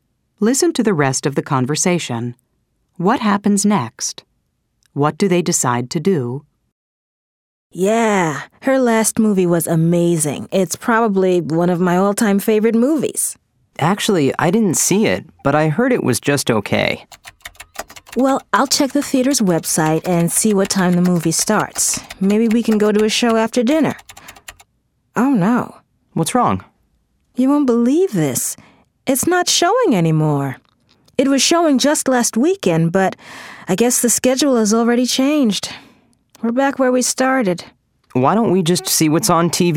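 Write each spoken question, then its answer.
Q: What happens next? What do they decide to do?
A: The movie isn't showing anymore, so they decide to see what's on TV tonight.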